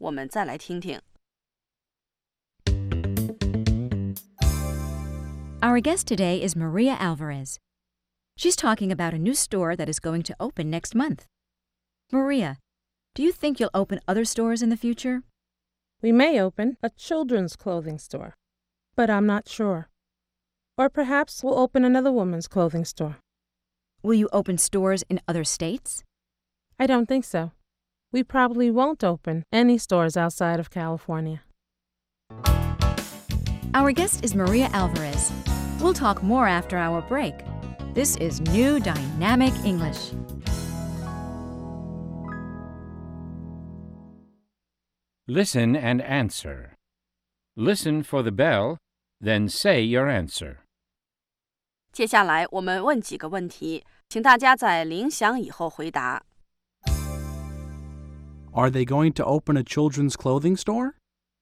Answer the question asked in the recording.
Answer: They may open a children's clothing store, but they're not sure.